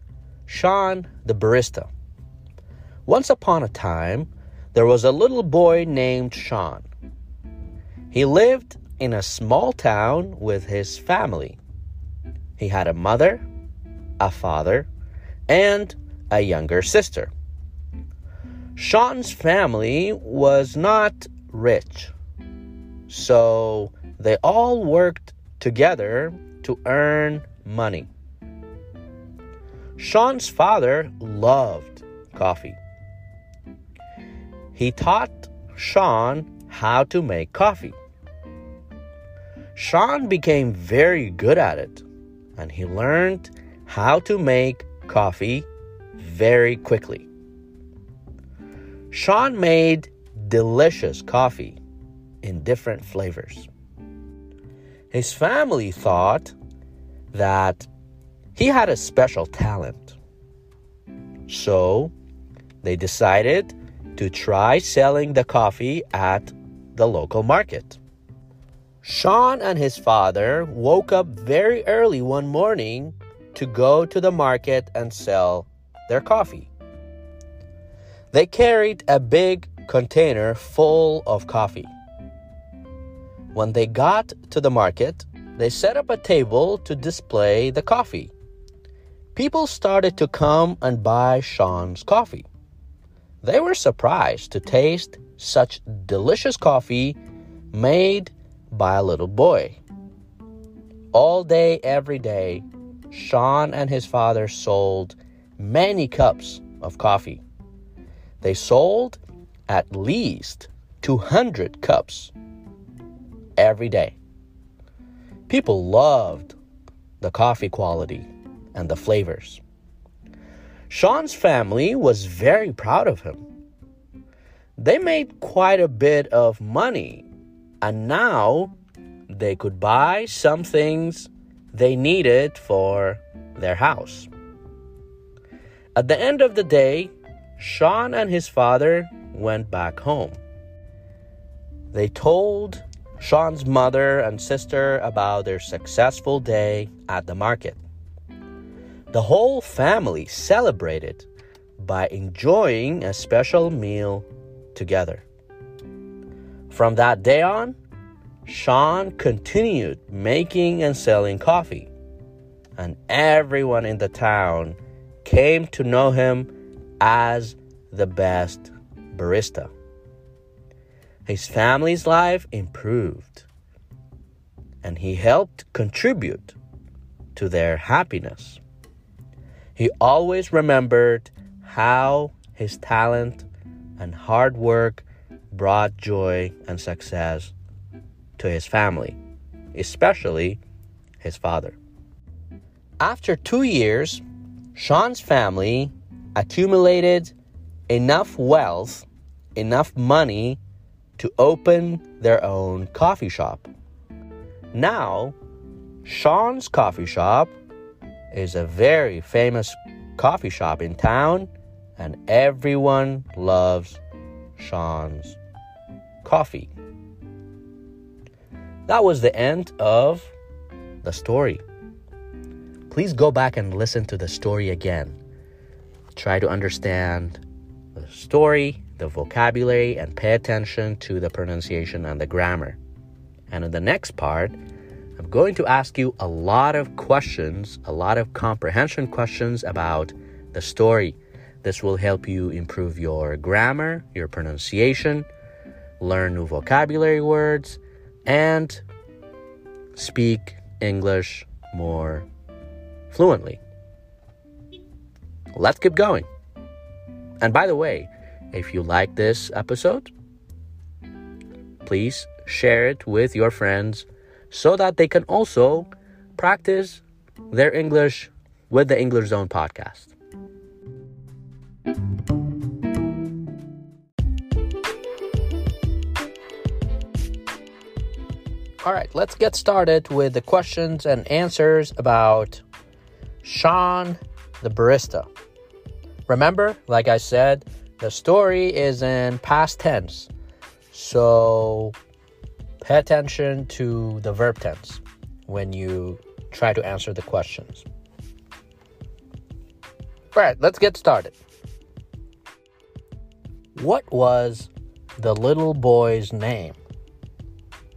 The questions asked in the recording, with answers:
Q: What was the little boy's name?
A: The little boy's name was Sean.